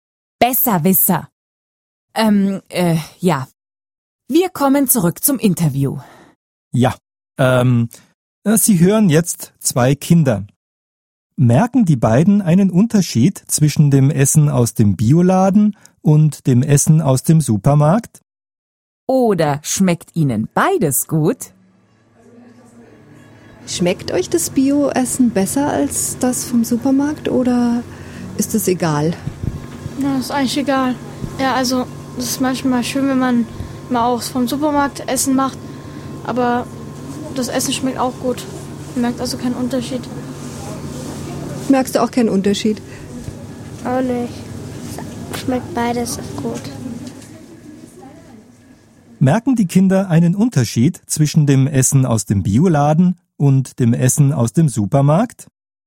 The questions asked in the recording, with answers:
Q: Merken die Kinder einen Unterschied zwischen dem Essen aus dem Bioladen und dem Essen aus dem Supermarkt?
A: Nein, sie merken keinen Unterschied.